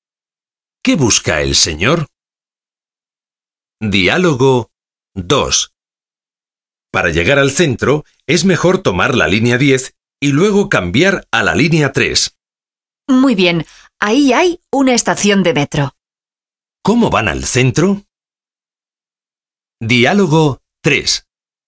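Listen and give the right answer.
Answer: En metro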